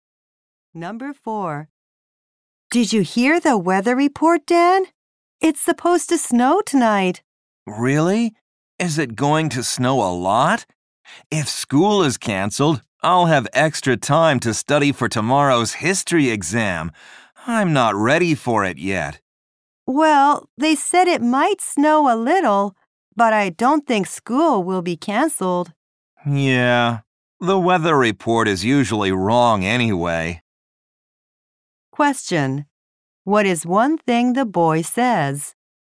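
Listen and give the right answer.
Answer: He is not ready for tomorrow's history exam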